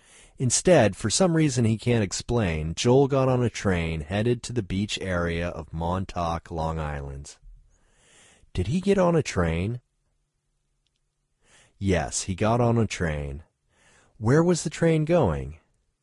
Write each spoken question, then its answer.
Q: Where was the train going?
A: The train was going to Montauk, Long Island.